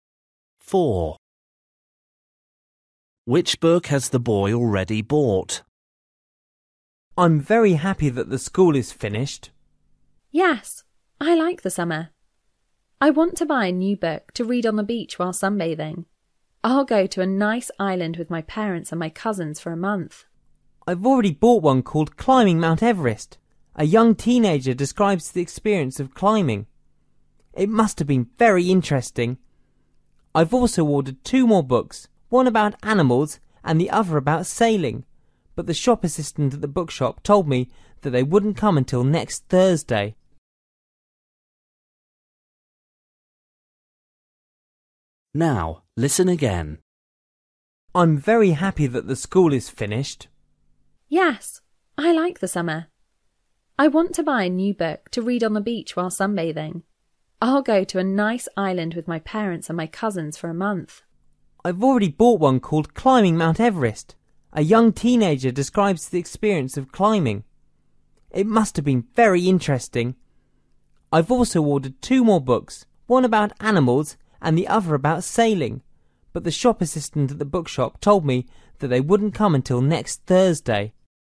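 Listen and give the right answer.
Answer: Climbing Mount Everest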